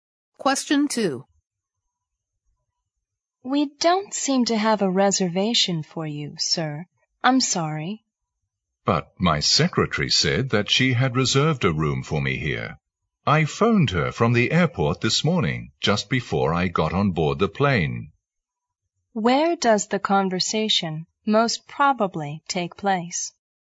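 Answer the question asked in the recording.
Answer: At a hotel front desk.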